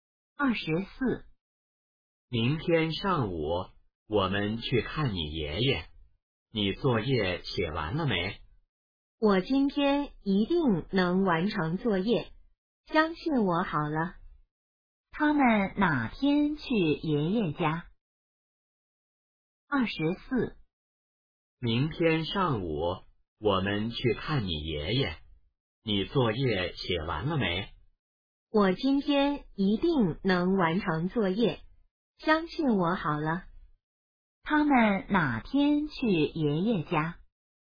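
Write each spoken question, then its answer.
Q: 他们哪天去爷爷家?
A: 明天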